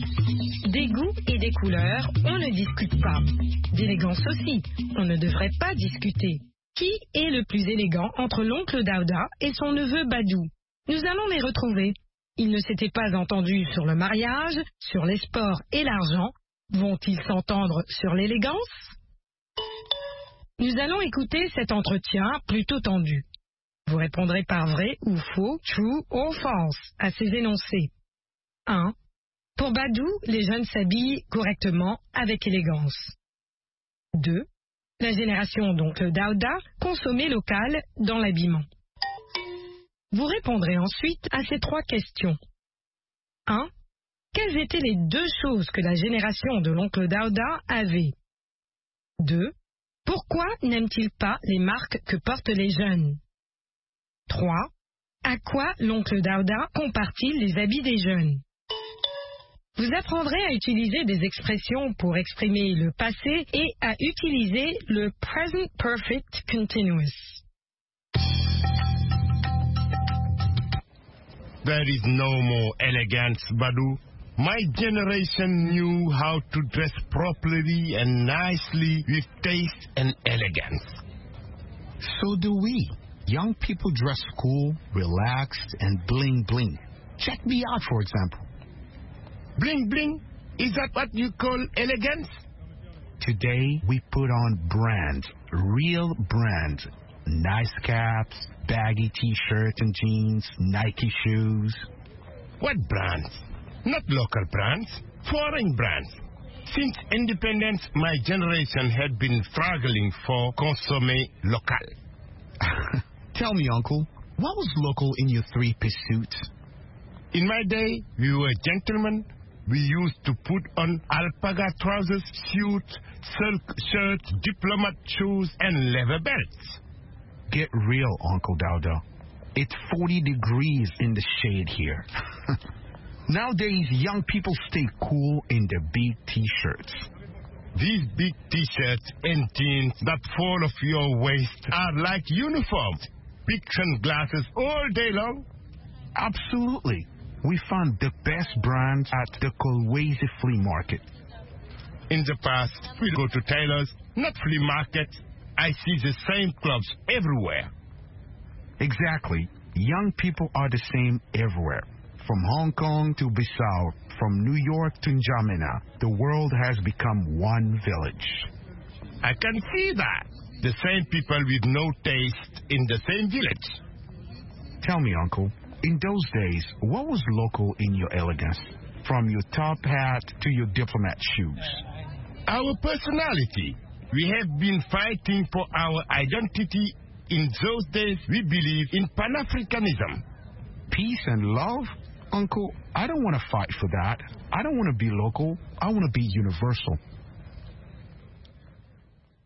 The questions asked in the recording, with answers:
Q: Pour Badou, les jeunes s'habillent correctement, avec élégance.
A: L'énoncé 1 est vrai.

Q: La génération d'oncle Dauda consommait local dans l'habillement.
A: L'énoncé 2 est faux.

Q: Quelles étaient les deux choses que la génération de l'oncle Dauda avait?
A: Le goût et l'élégance.

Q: Pourquoi n'aime-t-il pas les marques que portent les jeunes?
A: Parce qu'elles sont étrangères.

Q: À quoi l'oncle Dauda compare-t-il les habits des jeunes?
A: À des uniformes.